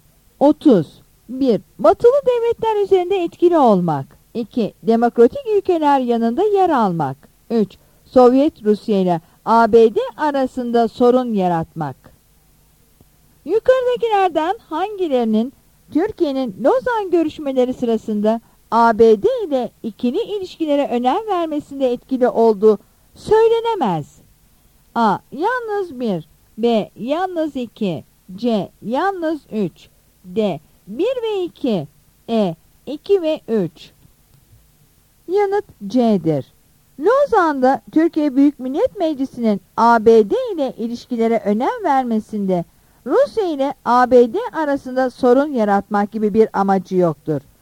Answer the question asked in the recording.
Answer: Yanıt C'dir.